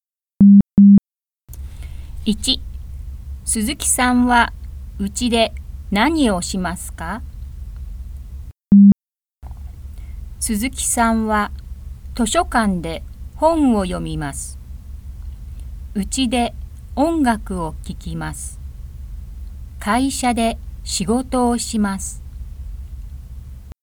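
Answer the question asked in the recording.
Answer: 音楽を聴きます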